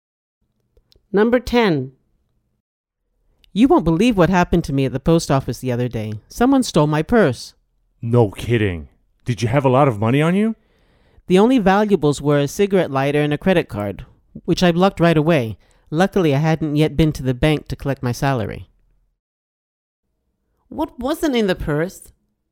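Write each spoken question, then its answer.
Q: What wasn't in the purse?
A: money (salary)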